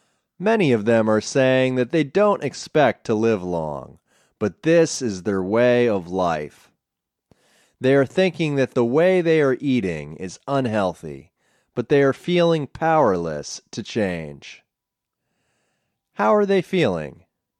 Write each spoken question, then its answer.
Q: How are they feeling?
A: They are feeling powerless to change.